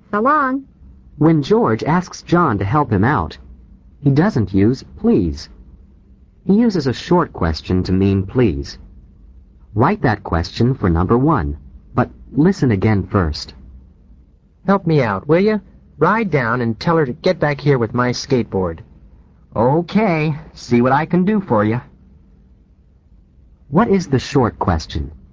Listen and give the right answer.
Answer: The correct answer is, will you?